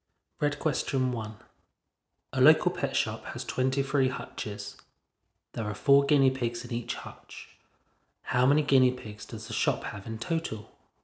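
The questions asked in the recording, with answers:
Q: How many guinea pigs does the shop have in total?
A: 92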